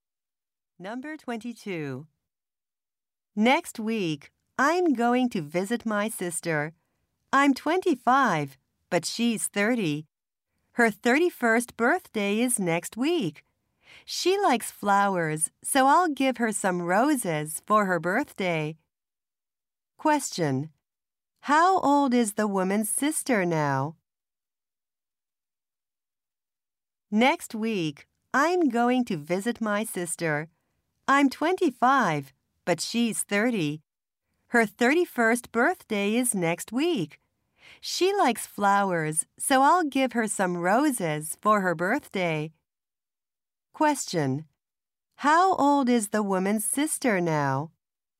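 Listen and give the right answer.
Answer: 30.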